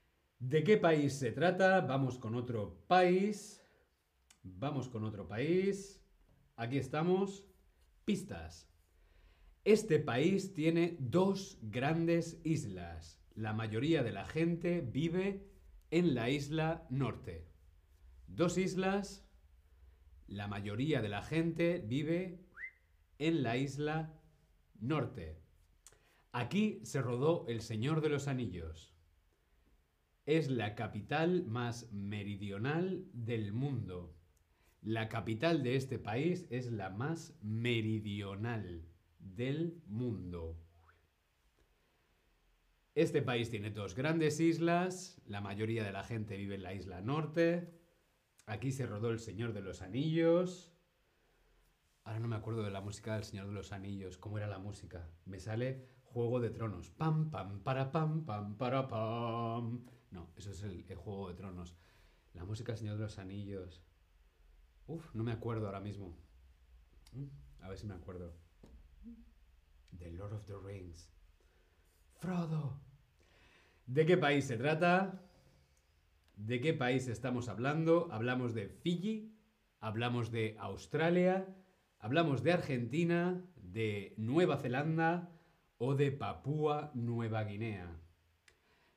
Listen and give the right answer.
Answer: Sí, Nueva Zelanda, este país, está compuesto por dos islas.